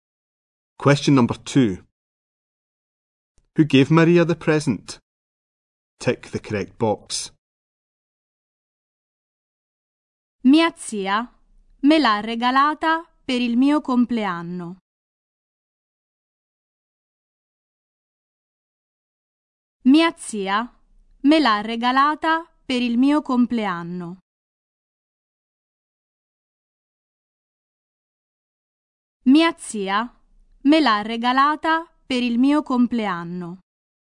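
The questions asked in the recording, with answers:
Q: Who gave Maria the present?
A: Her aunt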